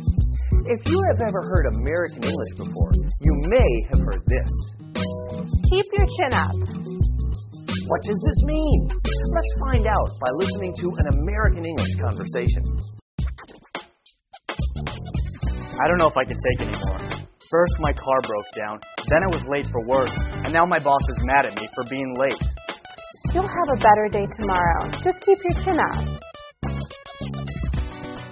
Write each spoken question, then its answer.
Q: What does this mean?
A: Keep your chin up means to keep your spirits high and remain cheerful in a difficult situation.